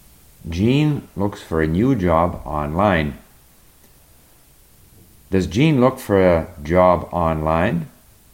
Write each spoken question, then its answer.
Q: Does Jean look for a job online?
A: Yes, he looks for a new job online.